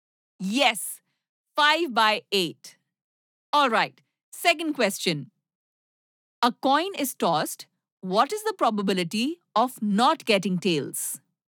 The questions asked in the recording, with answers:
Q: A coin is tossed. What is the probability of not getting tails?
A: 1/2. Yes.